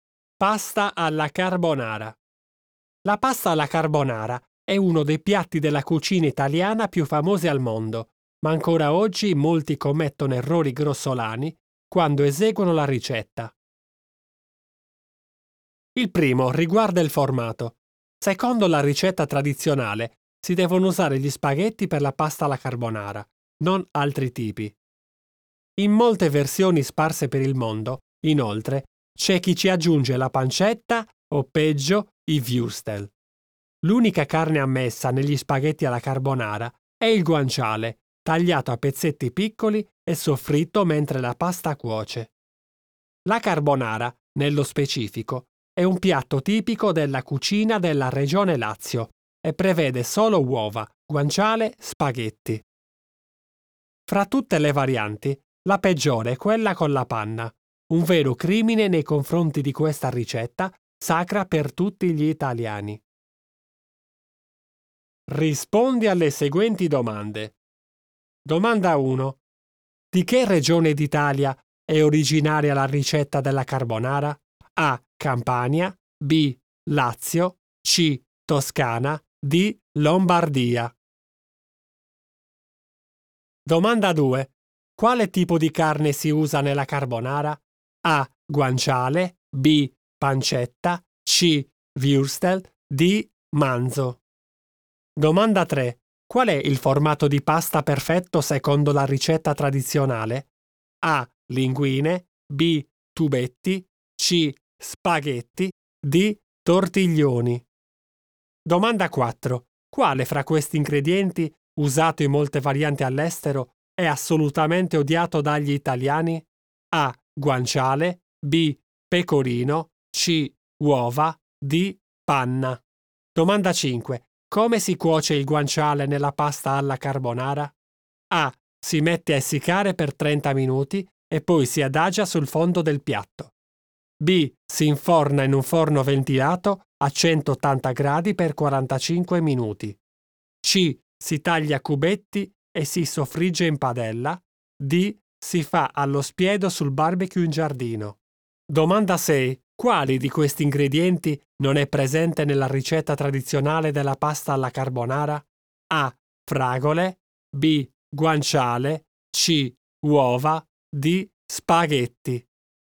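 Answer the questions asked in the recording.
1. B: Lazio
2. A: Guanciale
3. C: Spaghetti
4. D: Panna
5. C: Si taglia a cubetti e si soffrigge in padella.
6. A: Fragole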